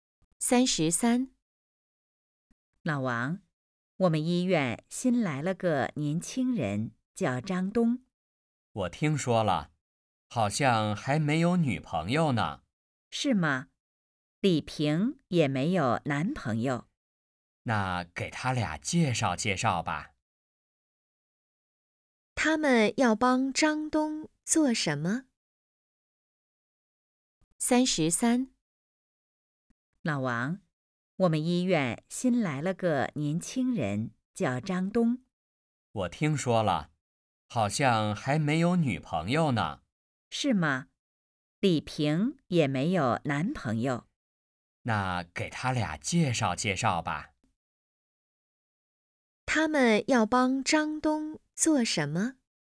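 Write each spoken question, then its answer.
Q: 他们要帮张东做什么?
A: 介绍女朋友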